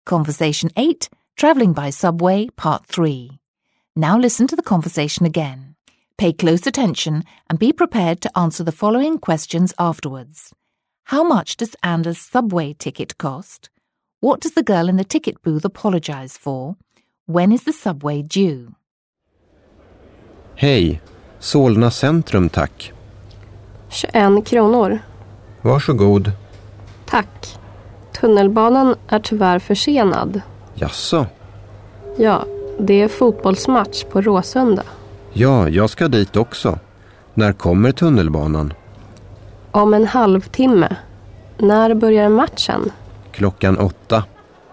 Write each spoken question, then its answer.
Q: How much does Anna's subway ticket cost?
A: If your answer was 21 kroner, you were correct.

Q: What does the girl in the ticket booth apologise for?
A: she apologises for the subway being delayed.

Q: When is the subway due?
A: I hope you said in half an hour, because that's the answer.